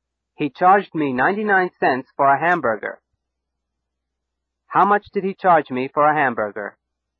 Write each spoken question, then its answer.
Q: How much did he charge me for a hamburger?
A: 99 cents. He charged me 99 cents for a hamburger.